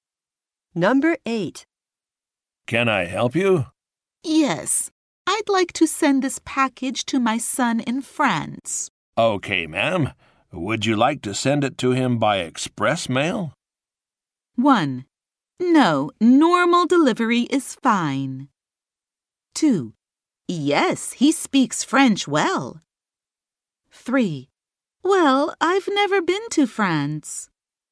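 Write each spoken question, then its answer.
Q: Okay, ma'am. Would you like to send it to him by express mail?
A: 1: No, normal delivery is fine.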